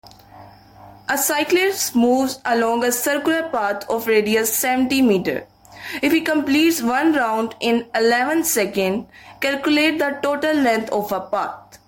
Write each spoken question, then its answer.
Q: If he completes one round in 11 seconds, calculate the total length of a path.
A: Number B option, 440 meters.